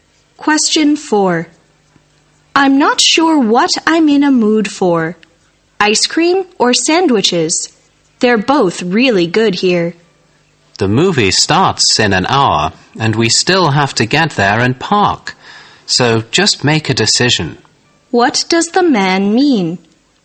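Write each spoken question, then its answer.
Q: What does the man mean?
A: The woman should decide quickly because they are short of time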